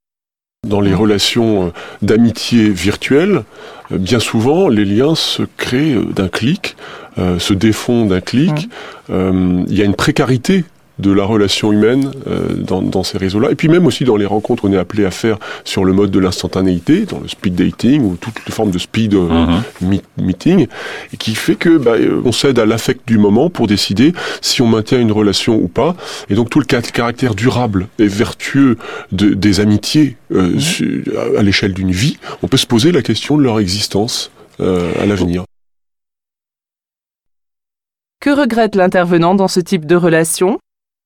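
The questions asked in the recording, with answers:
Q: Que regrette l'intervenant dans ce type de relation ?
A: La précarité des relations : les liens se créent et se défont d'un clic, sans durabilité.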